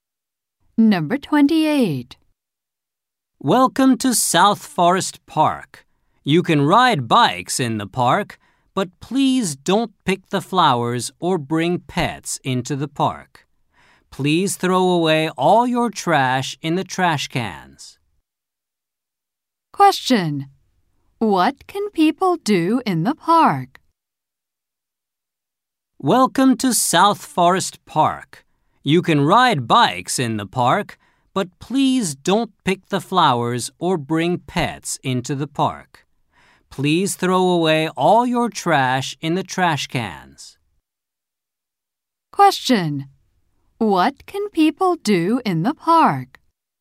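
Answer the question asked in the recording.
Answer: Ride bikes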